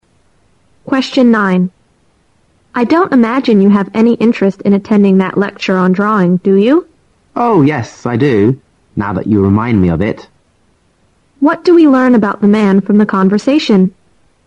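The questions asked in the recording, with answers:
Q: What do we learn about the man from the conversation?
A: He is interested in attending the lecture on drawing.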